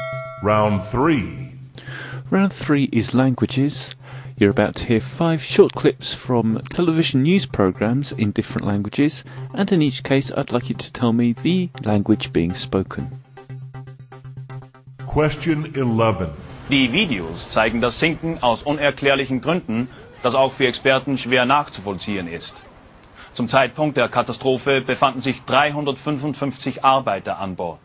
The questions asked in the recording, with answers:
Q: I'd like you to tell me the language being spoken.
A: German.